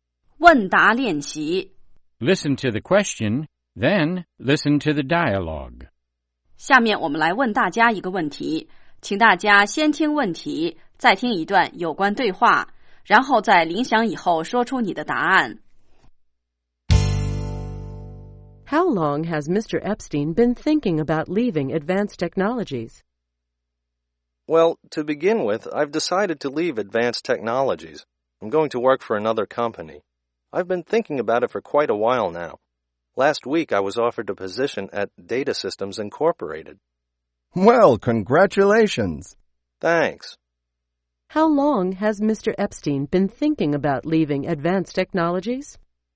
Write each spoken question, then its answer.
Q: How long has Mr. Epstein been thinking about leaving Advanced Technologies?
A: He's been thinking about leaving for quite a while.